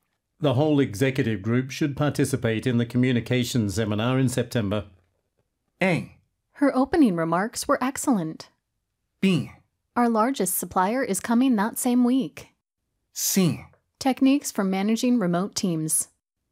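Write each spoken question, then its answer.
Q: The whole executive group should participate in the communications seminar in September.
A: B: Our largest supplier is coming that same week.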